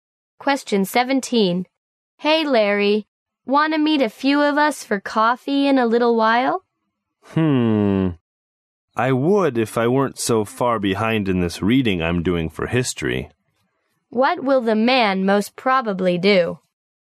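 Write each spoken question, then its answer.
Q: What will the man most probably do?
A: Stay and do his history reading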